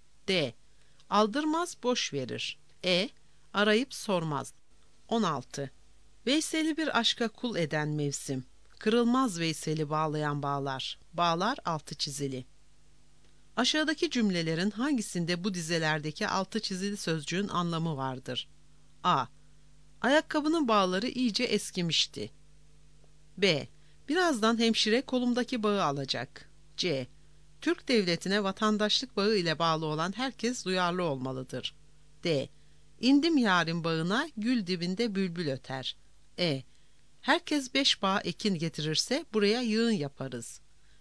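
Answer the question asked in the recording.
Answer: C: Türk devletine vatandaşlık bağı ile bağlı olan herkes duyarlı olmalıdır.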